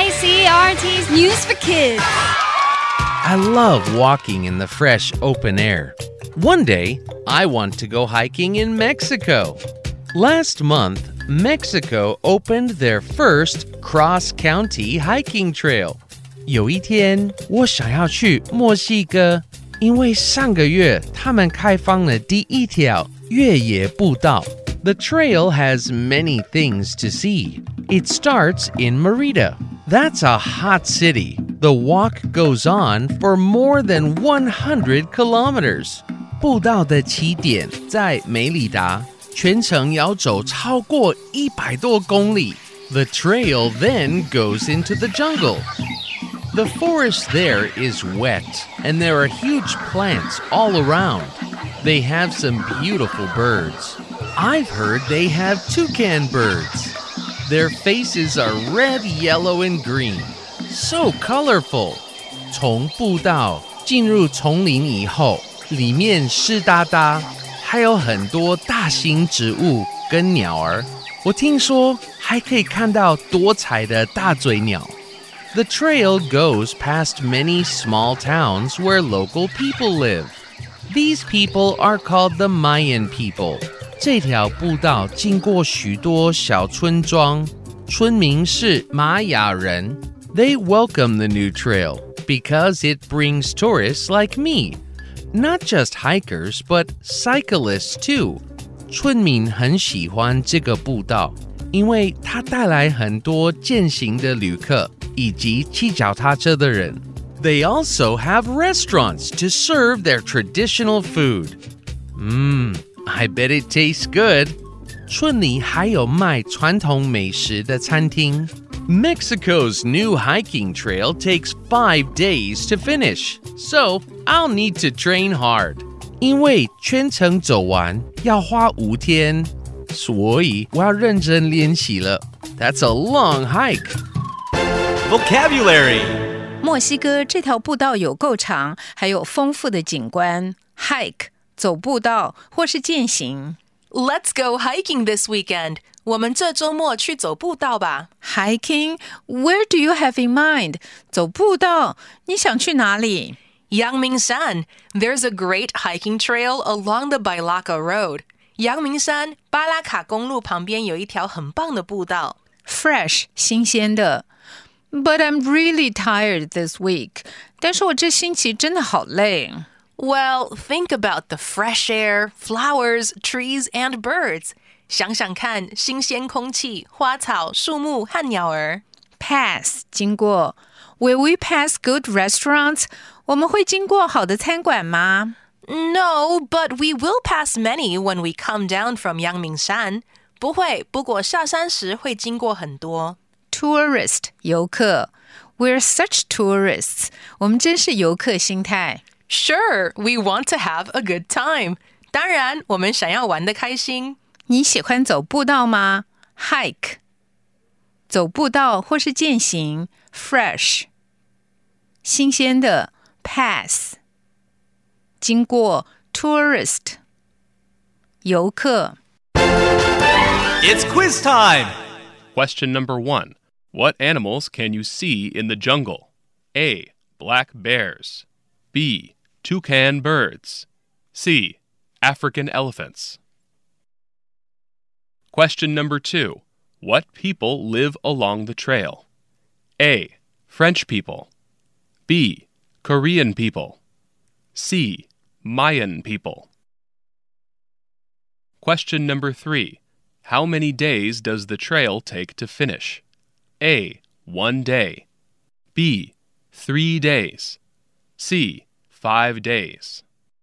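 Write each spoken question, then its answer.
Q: What animals can you see in the jungle?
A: B: Toucan birds.

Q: What people live along the trail?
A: C: Mayan people.

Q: How many days does the trail take to finish?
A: C: 5 days.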